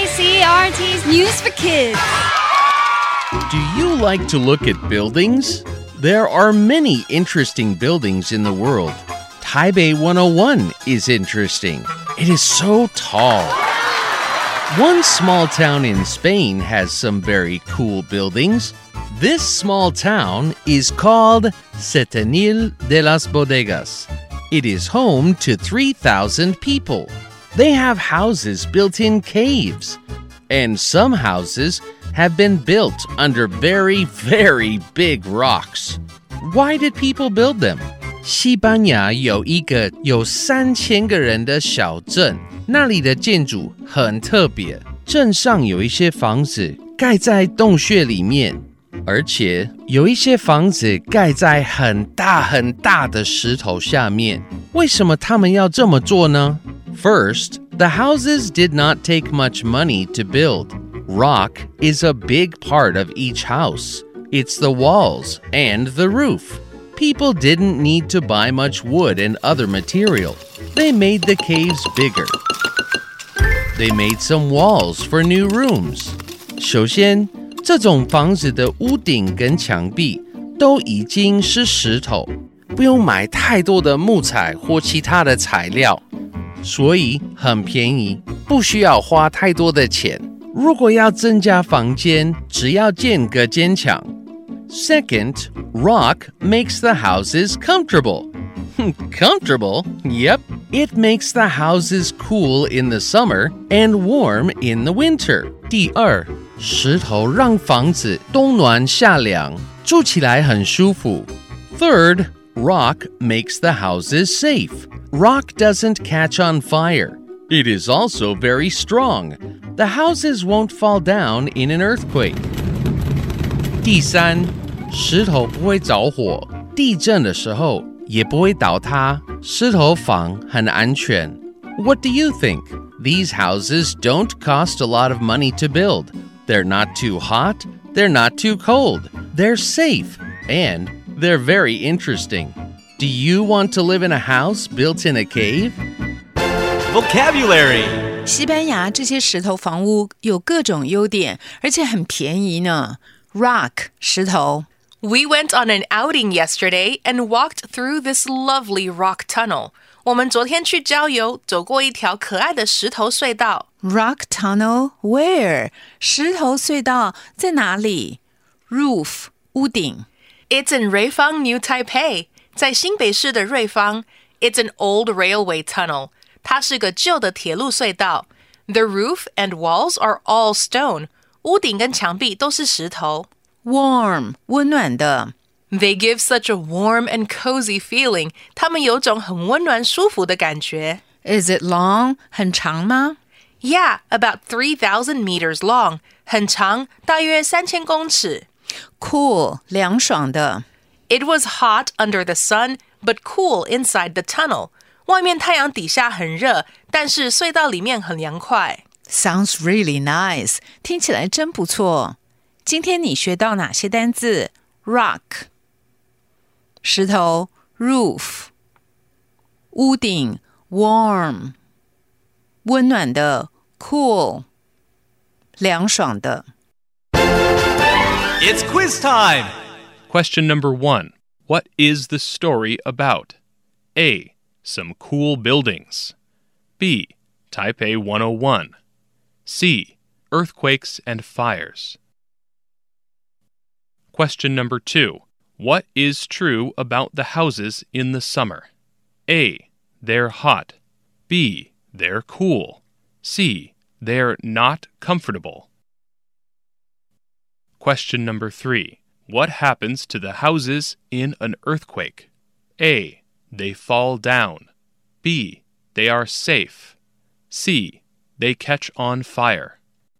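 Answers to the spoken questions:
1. A: Some cool buildings.
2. B: They're cool.
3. B: They are safe.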